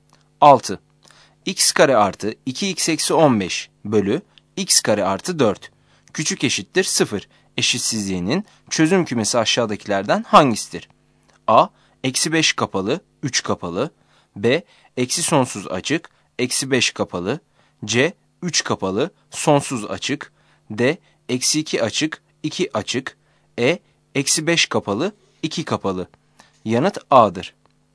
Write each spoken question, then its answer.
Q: Eşitsizliğinin çözüm kümesi aşağıdakilerden hangisidir?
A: Yanıt A'dır.